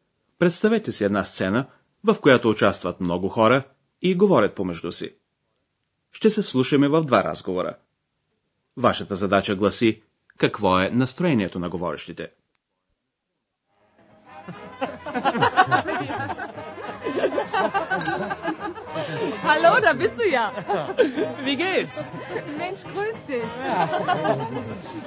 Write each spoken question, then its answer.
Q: Вашата задача гласи какво е настроението на говорещите.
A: Тук е весело, нали?